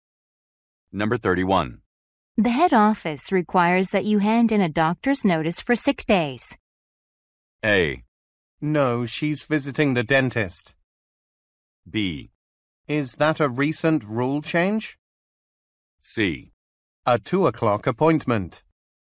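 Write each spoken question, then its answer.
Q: The head office requires that you hand in a doctor's notice for sick days.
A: B: Is that a recent rule change?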